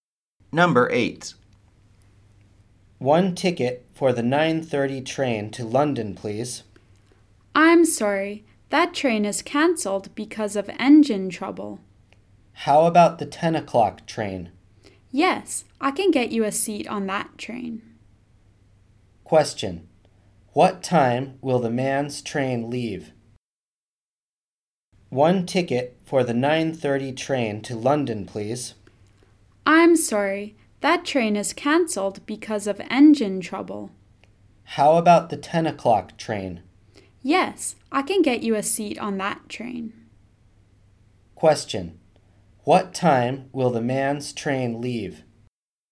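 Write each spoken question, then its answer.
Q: What time will the man's train leave?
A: At ten o'clock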